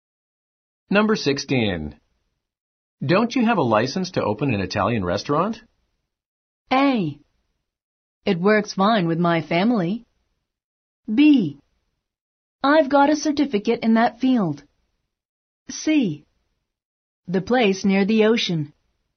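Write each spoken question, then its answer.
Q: Don't you have a license to open an Italian restaurant?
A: B: I've got a certificate in that field.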